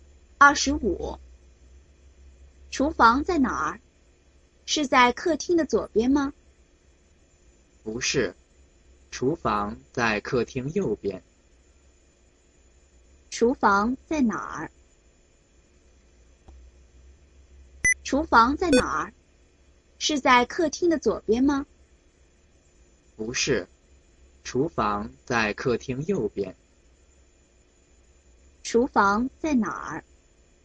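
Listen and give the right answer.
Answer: 客厅右边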